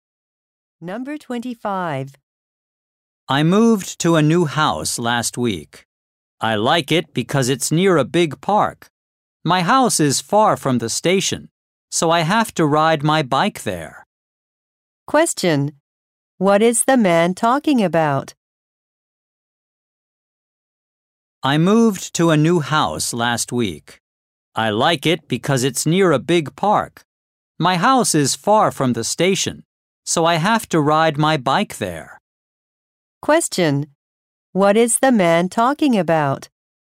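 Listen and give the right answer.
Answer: His new house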